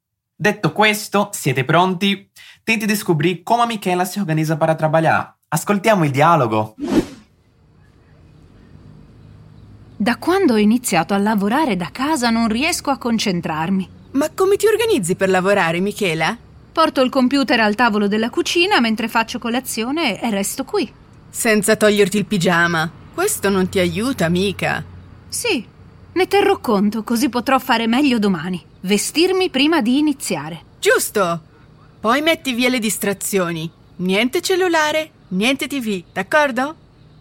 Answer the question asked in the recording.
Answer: Porto il computer al tavolo della cucina mentre faccio colazione e resto qui.